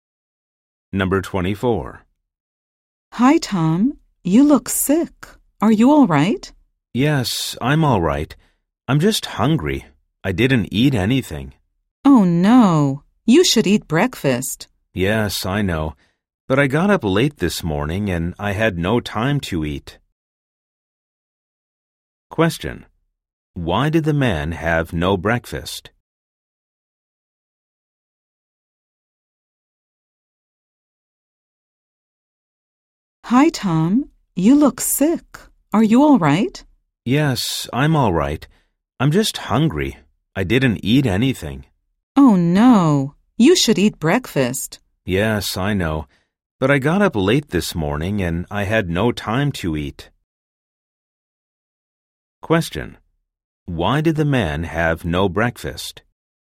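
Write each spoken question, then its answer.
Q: Why did the man have no breakfast?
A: He got up late and had no time to eat.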